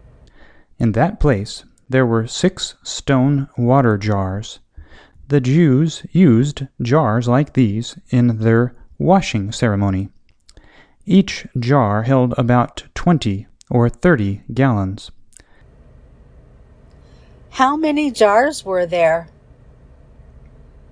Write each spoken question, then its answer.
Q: How many jars were there?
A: 6 jars were there.